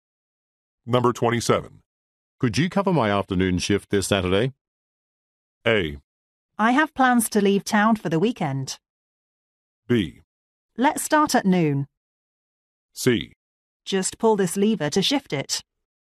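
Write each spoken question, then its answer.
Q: Could you cover my afternoon shift this Saturday?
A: A: I have plans to leave town for the weekend.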